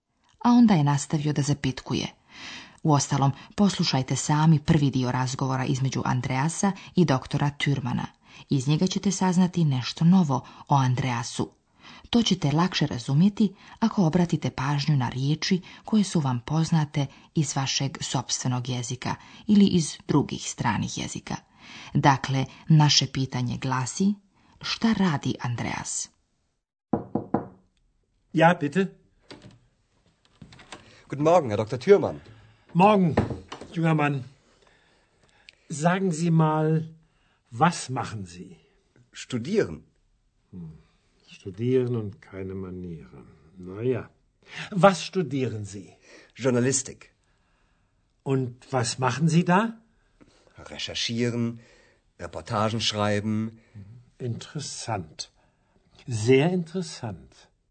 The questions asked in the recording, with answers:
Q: Dakle, naše pitanje glasi, šta radi Andreas?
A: Andreas studira žurnalistiku ili novinarstvo.